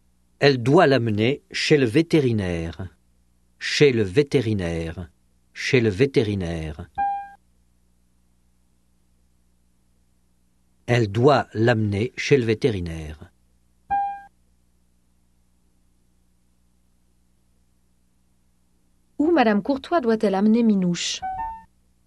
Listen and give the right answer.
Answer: Chez le vétérinaire.